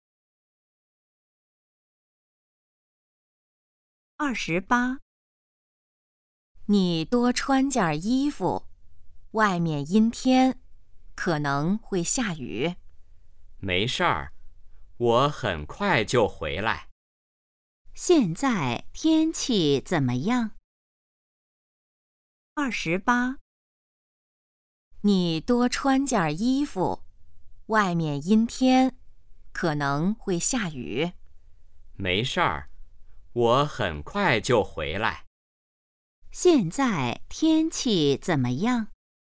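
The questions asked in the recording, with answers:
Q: 现在天气怎么样?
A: 阴天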